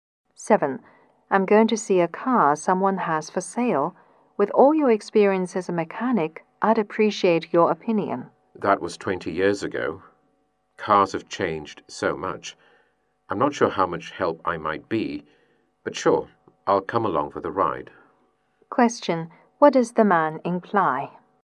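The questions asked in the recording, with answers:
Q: What does the man imply?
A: He'll go along, but he may not be much help.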